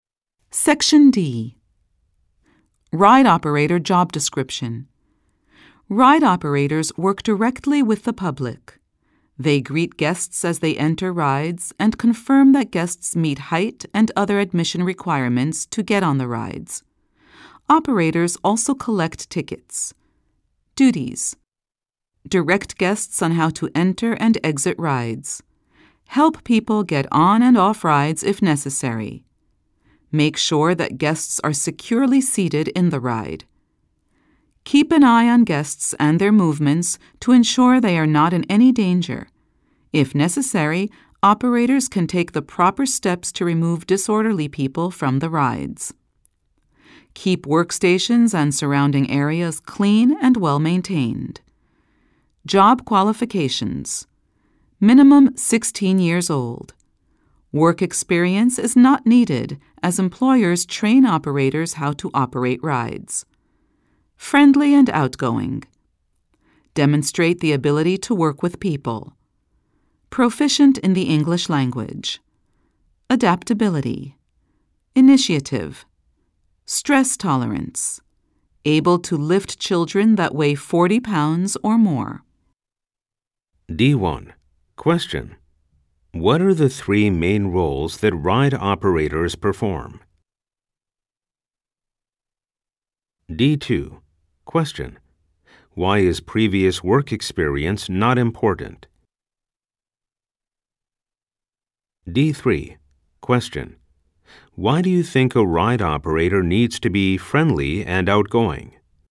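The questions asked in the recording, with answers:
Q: What are the three main roles that ride operators perform?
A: Greet guests, confirm they meet height and admission requirements, and collect tickets

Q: Why is previous work experience not important?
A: Employers train operators how to operate rides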